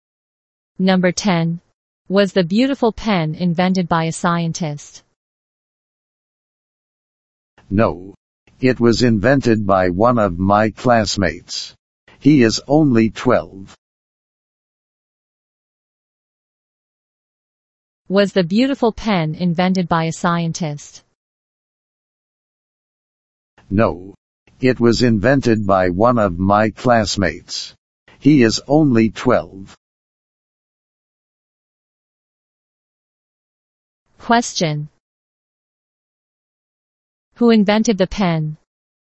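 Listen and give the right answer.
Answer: One of the speaker's classmates, who is only 12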